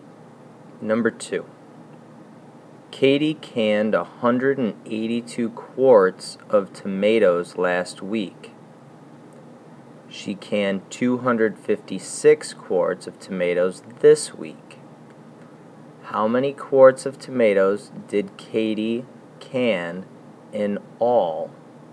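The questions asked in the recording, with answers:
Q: How many quarts of tomatoes did Katie can in all?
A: 438 quarts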